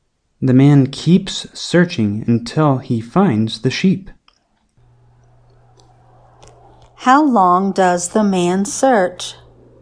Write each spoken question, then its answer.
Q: How long does the man search?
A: The man searches until he finds the sheep.